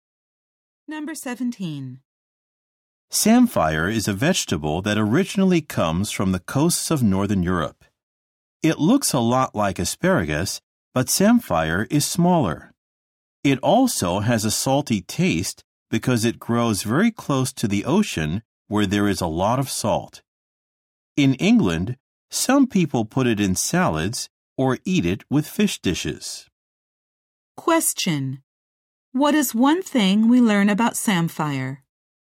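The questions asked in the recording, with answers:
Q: What is one thing we learn about samphire?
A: It tastes salty because it grows near the ocean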